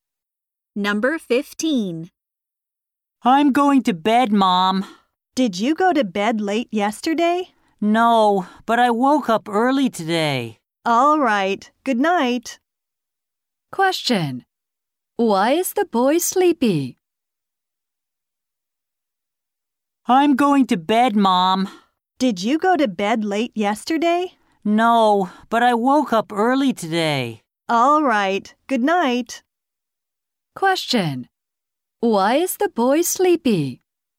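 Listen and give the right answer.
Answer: He woke up early today.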